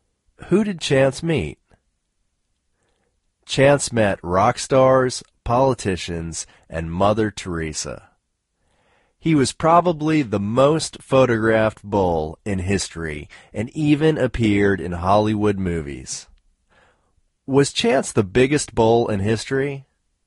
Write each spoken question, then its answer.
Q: Was Chance the biggest bull in history?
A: No, Chance wasn't the biggest bull in history.